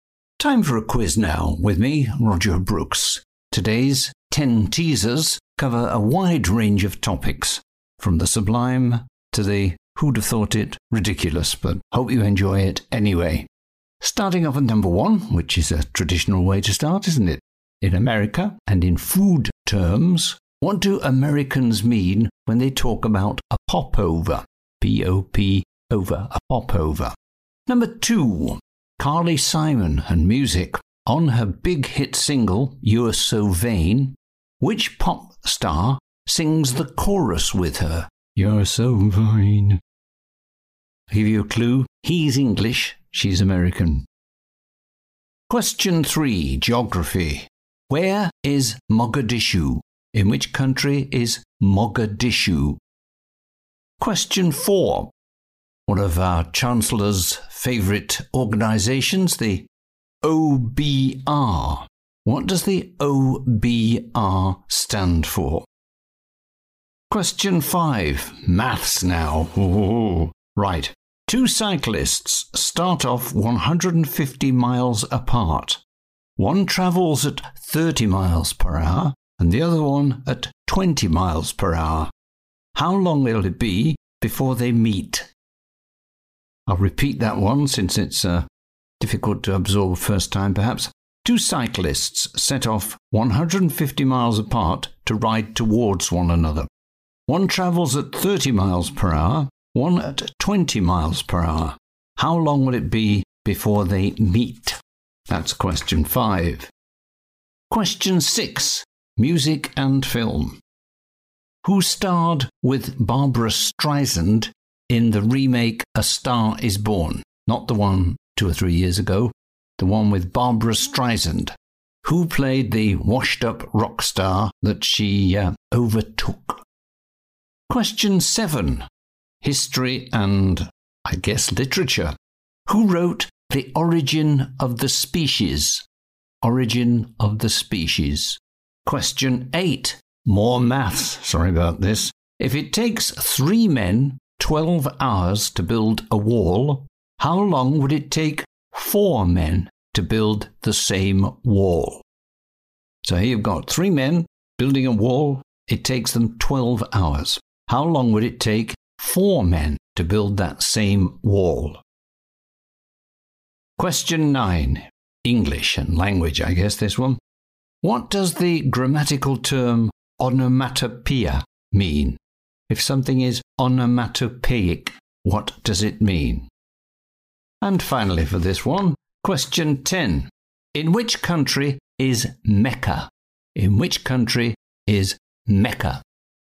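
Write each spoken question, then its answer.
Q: How long will it be before they meet?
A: 3 hours

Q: If it takes three men 12 hours to build a wall, how long would it take four men to build the same wall?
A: 9 hours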